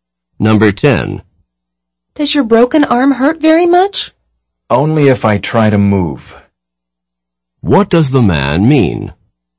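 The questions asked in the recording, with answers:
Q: What does the man mean?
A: His arm hurts only when he tries to move it.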